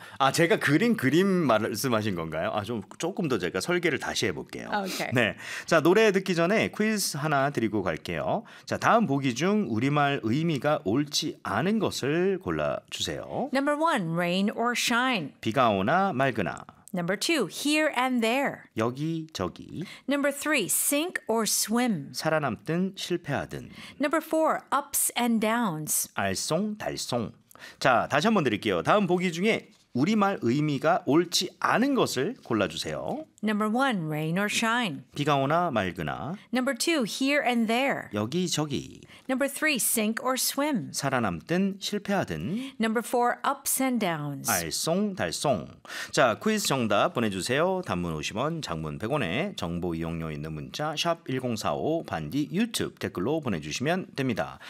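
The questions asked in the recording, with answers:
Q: 자 다음 보기 중 우리말 의미가 옳지 않은 것을 골라주세요.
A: 4: ups and downs - 알쏭달쏭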